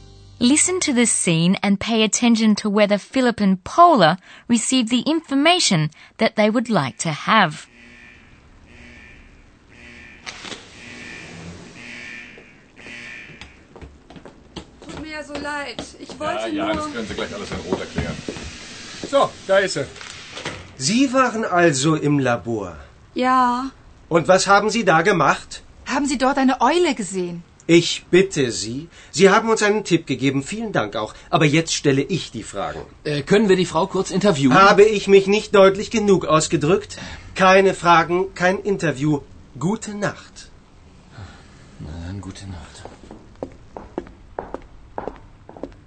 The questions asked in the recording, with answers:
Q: Listen to the scene and pay attention to whether Philip and Paula received the information that they would like to have.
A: Unfortunately, Philip and Paula don't get any information.